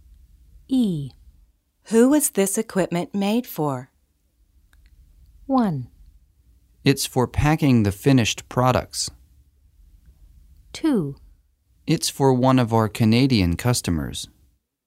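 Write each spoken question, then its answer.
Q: Who was this equipment made for?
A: 2: It's for one of our Canadian customers.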